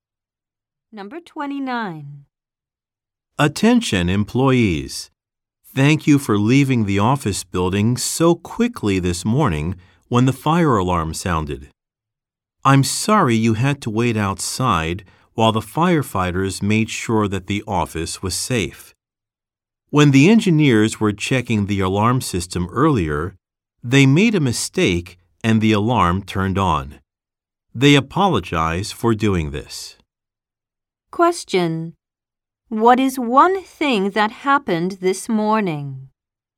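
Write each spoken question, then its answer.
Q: What is one thing that happened this morning?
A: Engineers made a mistake and set off the fire alarm.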